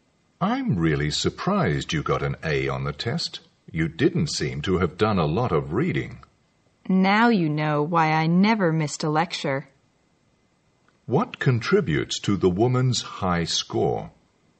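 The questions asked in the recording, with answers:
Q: What contributes to the woman's high score?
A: Attending all the lectures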